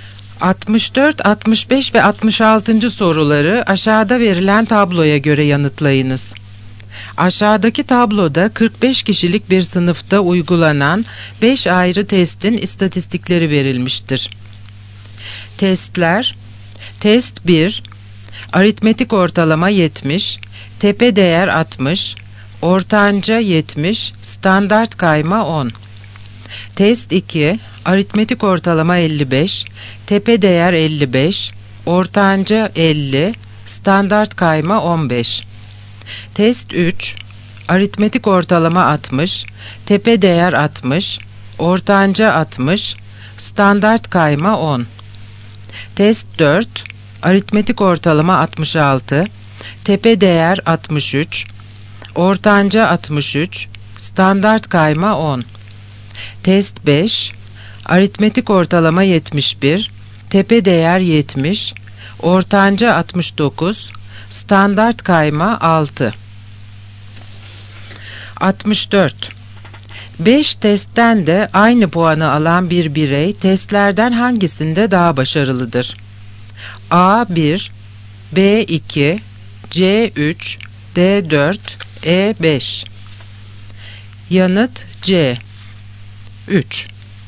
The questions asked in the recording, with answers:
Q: 5 testten de aynı puanı alan bir birey testlerden hangisinde daha başarılıdır?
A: Yanıt C 3.